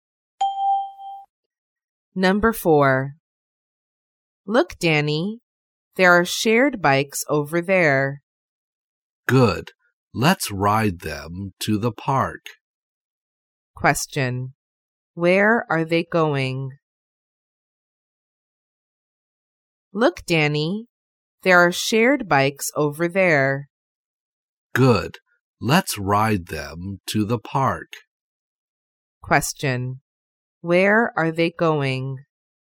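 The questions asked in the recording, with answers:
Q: Question.Where are they going?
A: To the park.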